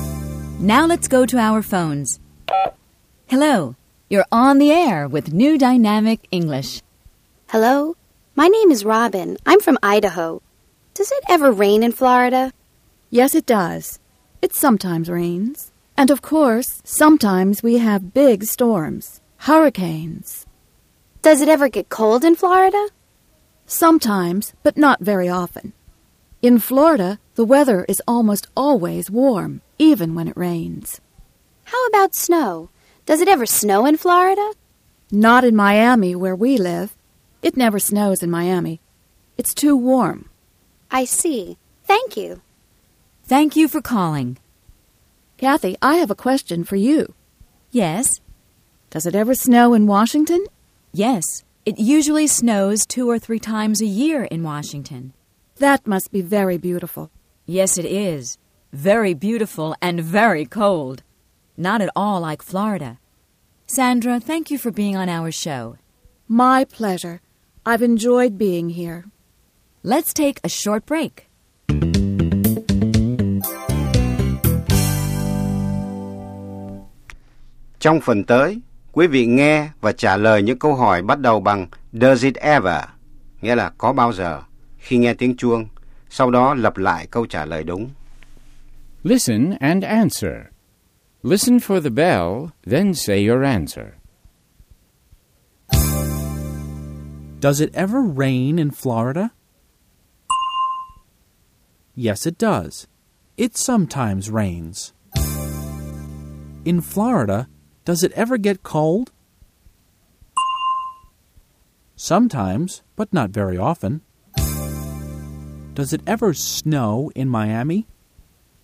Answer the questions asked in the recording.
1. Yes, it does. It sometimes rains.
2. Sometimes, but not very often.
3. No, it doesn't. It never snows in Miami.